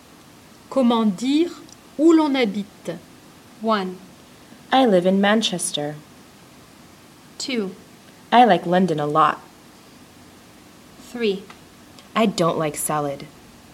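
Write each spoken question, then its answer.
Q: Comment dire où l'on habite?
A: 1: I live in Manchester.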